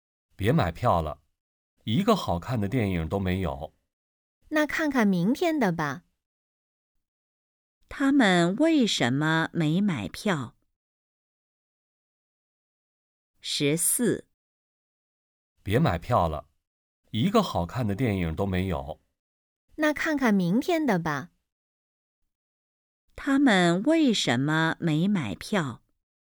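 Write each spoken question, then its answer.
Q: 他们为什么没买票?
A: 没有好看的电影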